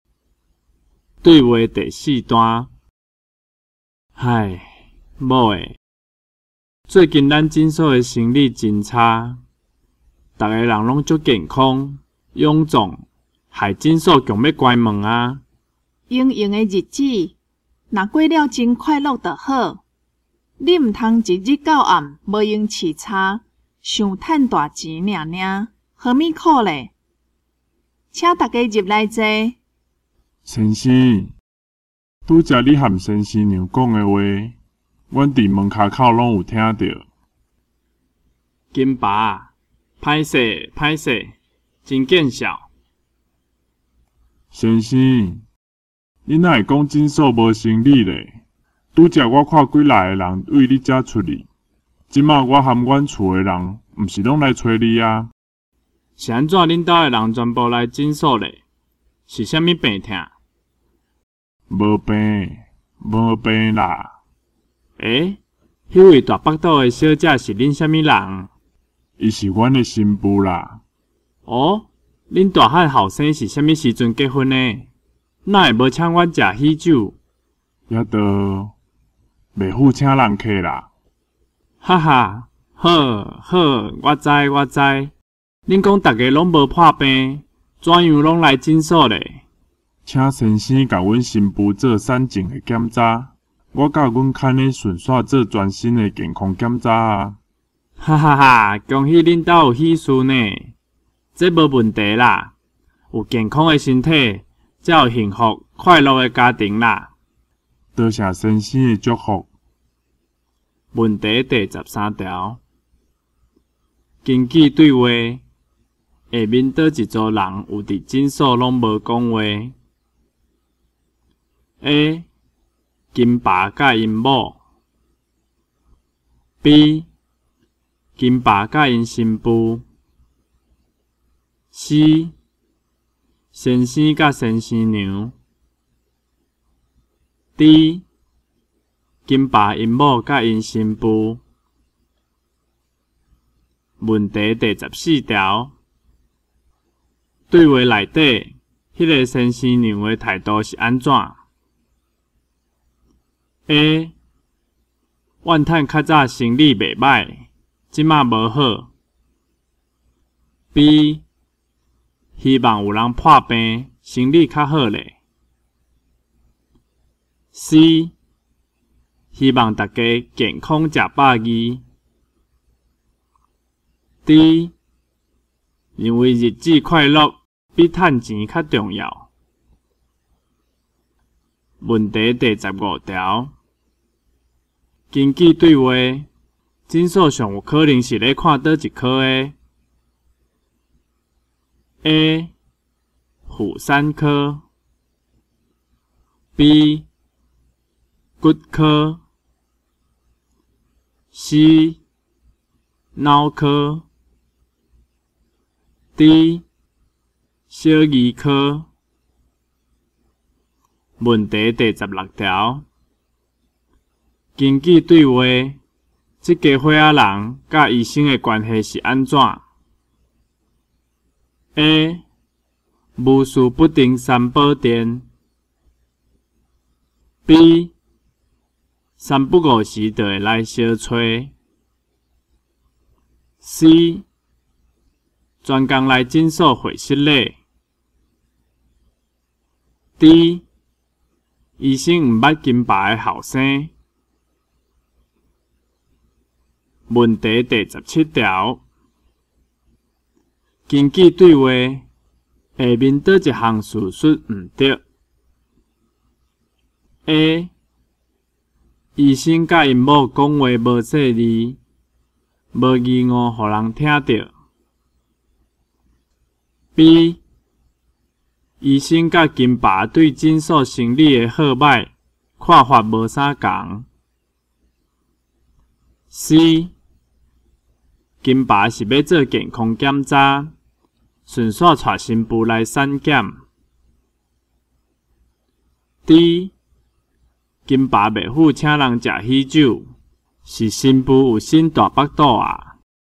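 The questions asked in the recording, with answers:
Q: 根据对话,下面倒一组人有伫诊所拢无讲话。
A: D: 金爸因某甲因新妇

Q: 对话内底,迄个先生娘的态度是安怎?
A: D: 认为日子快乐比赚钱较重要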